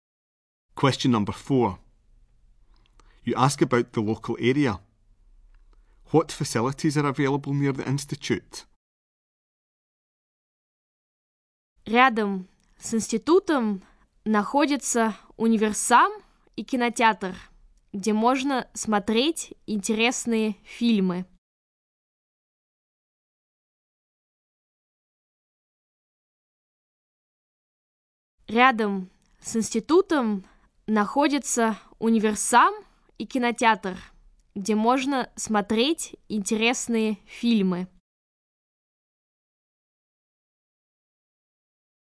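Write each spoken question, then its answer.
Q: What facilities are available near the institute?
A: A supermarket and a cinema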